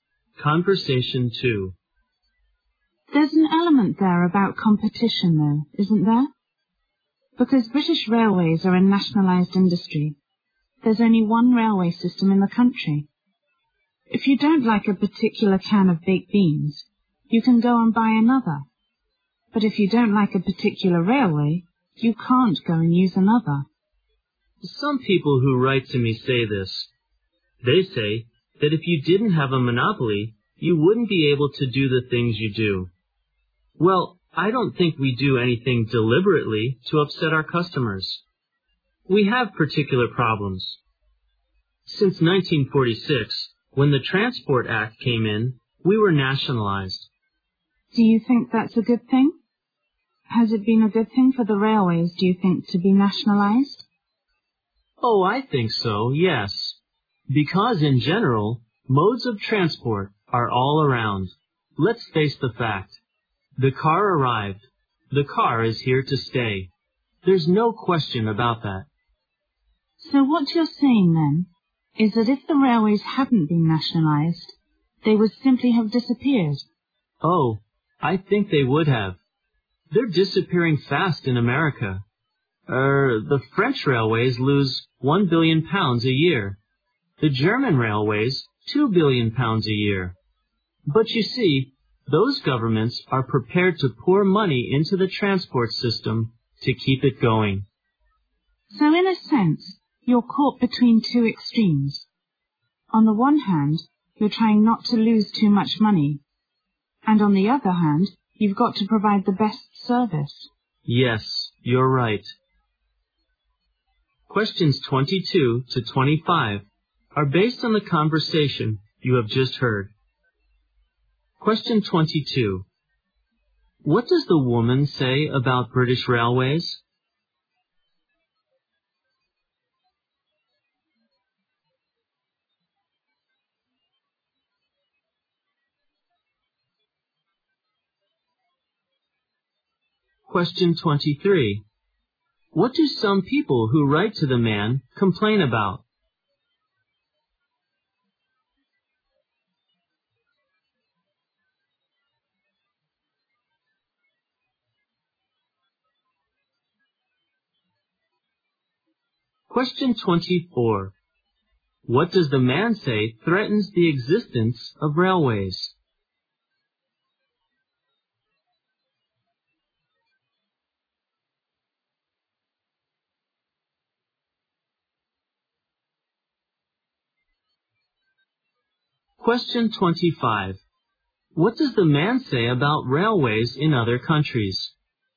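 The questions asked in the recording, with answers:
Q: What does the woman say about British Railways?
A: It is nationalized, with only one railway system and no competition.

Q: What do some people who write to the man complain about?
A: The railway's monopoly.

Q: What does the man say threatens the existence of railways?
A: The car.

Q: What does the man say about railways in other countries?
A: They lose a lot of money, but their governments fund them.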